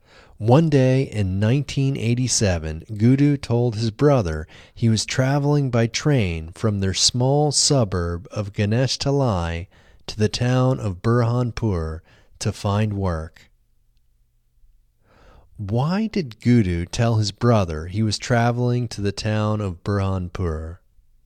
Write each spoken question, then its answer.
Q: Why did Gudu tell his brother he was traveling to the town of Burhanpur?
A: Gudu told his brother he was traveling to the town of Burhanpur to find work.